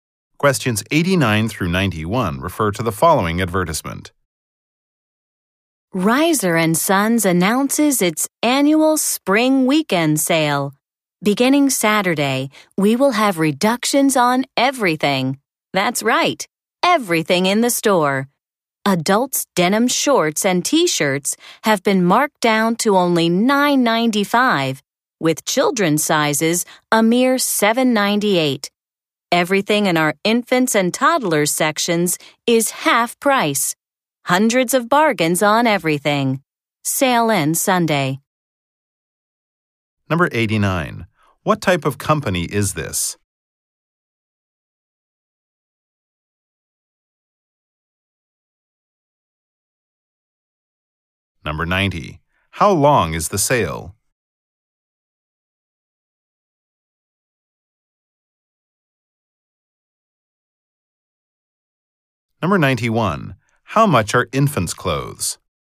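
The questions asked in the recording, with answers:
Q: What type of company is this?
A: A clothing store

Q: How long is the sale?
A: A weekend (Saturday to Sunday)

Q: How much are infants' clothes?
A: Half price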